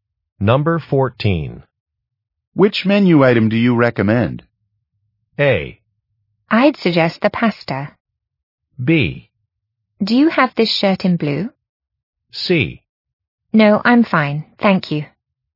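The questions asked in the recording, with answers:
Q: Which menu item do you recommend?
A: A: I'd suggest the pasta.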